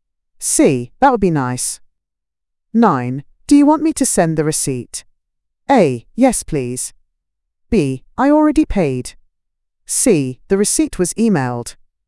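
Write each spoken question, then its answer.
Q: Do you want me to send the receipt?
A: A: Yes, please.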